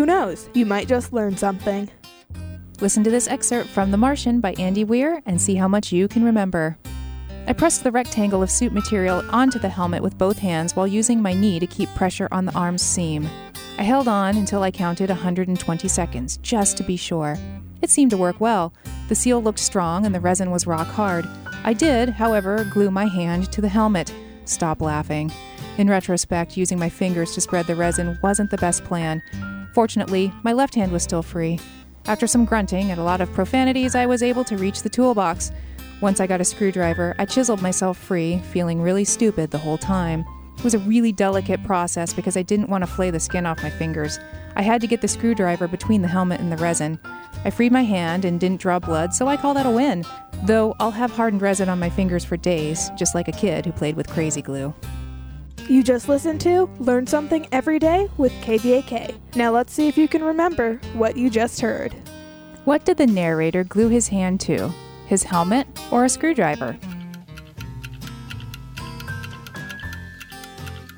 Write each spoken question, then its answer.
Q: What did the narrator glue his hand to?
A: He glued his hand to his helmet.